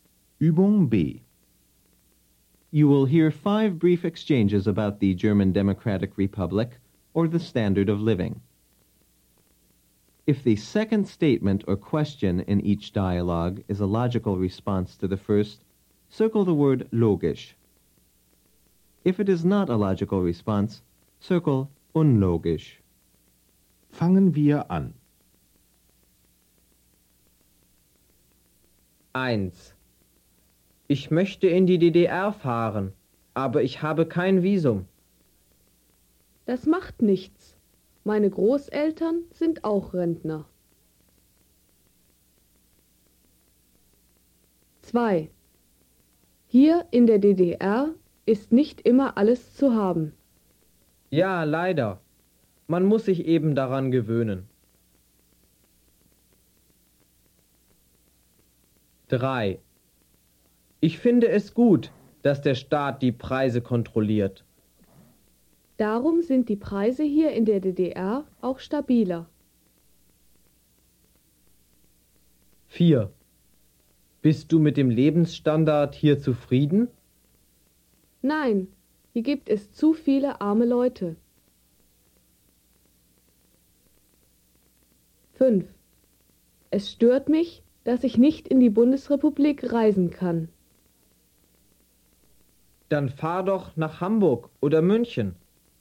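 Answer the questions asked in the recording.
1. unlogisch
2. logisch
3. logisch
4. logisch
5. unlogisch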